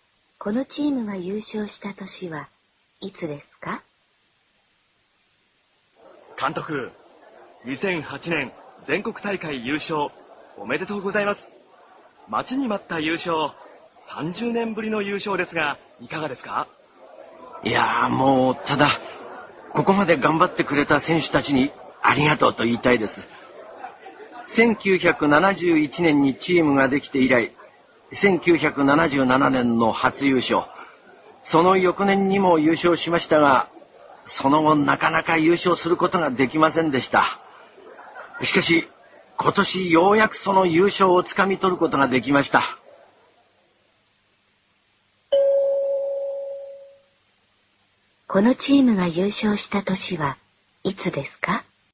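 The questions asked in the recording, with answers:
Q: このチームが優勝した年はいつですか?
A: 1977年、1978年、2008年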